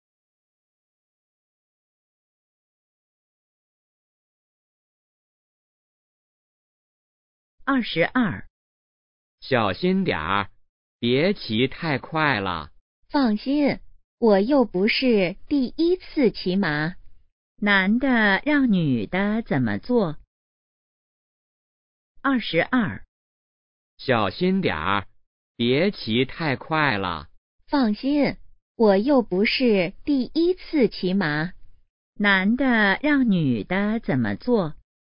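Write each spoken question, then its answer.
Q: 男的让女的怎么做?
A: 别骑太快,小心点儿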